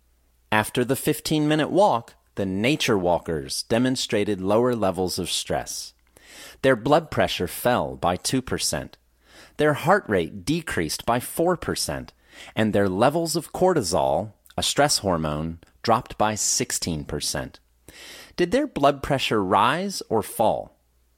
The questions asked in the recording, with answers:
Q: Did their blood pressure rise or fall?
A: Their blood pressure fell by 2%.